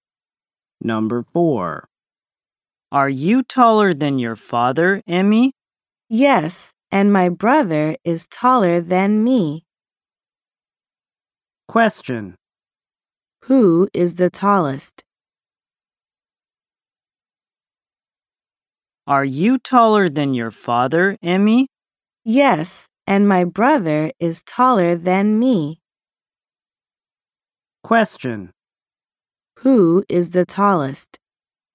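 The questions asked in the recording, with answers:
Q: Who is the tallest?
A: Emmy's brother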